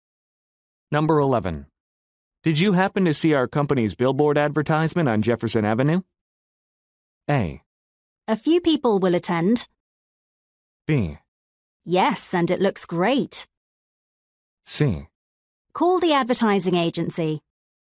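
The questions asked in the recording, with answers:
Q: Did you happen to see our company's billboard advertisement on Jefferson Avenue?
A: B: Yes, and it looks great.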